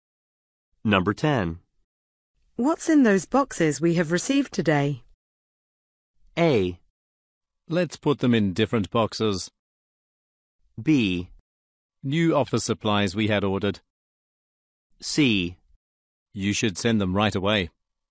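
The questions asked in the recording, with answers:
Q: What's in those boxes we have received today?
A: B: New office supplies we had ordered.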